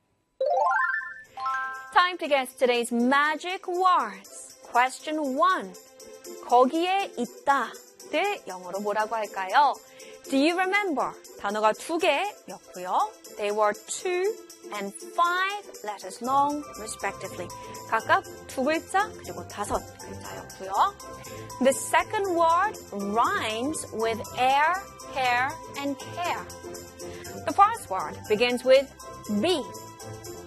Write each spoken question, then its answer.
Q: 거기에 있다를 영어로 뭐라고 할까요?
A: 거기에 있다. Be there.